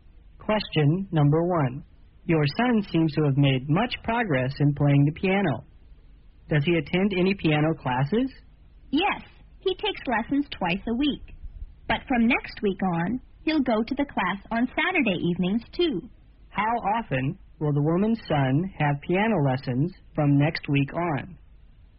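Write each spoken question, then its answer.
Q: How often will the woman's son have piano lessons from next week on?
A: Three times a week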